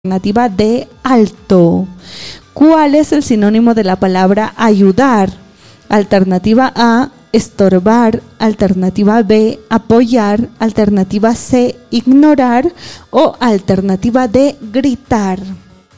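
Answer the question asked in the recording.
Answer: B: apoyar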